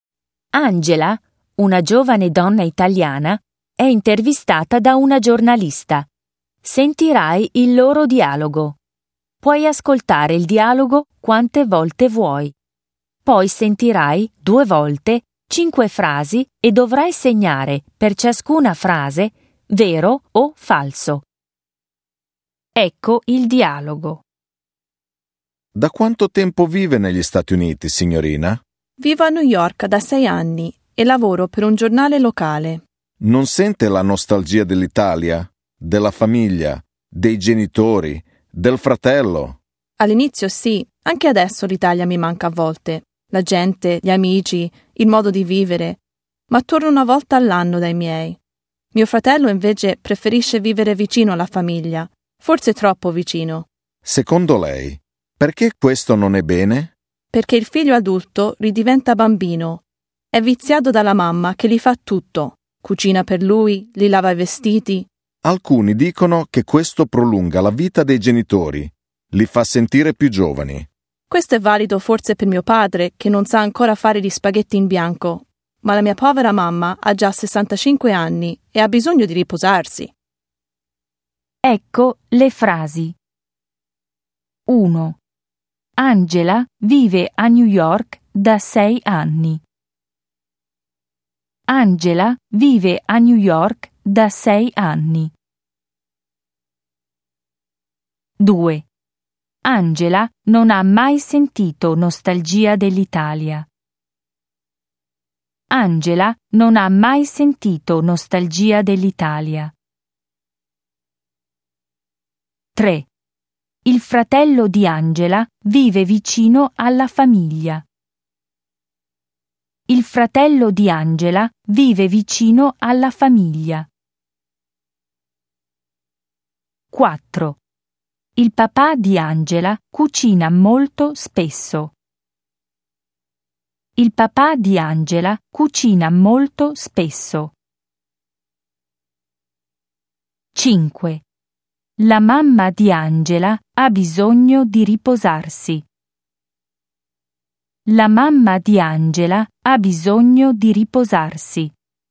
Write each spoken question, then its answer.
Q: Angela vive a New York da 6 anni.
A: 1. Vero.

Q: Angela non ha mai sentito nostalgia dell'Italia.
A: 2. Falso.

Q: Il fratello di Angela vive vicino alla famiglia.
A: 3. Vero.

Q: Il papà di Angela cucina molto spesso.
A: 4. Falso.

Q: La mamma di Angela ha bisogno di riposarsi.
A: 5. Vero.